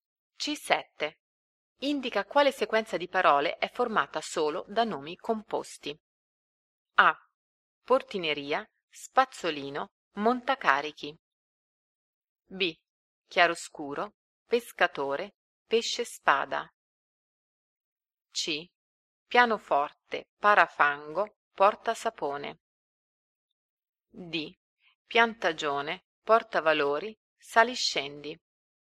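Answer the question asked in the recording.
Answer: C: Pianoforte, parafango, porta sapone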